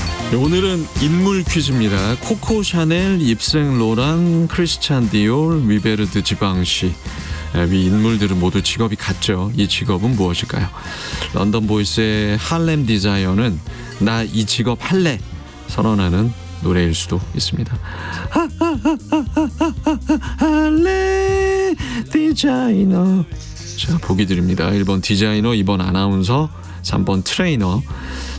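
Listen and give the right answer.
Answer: 1번: 디자이너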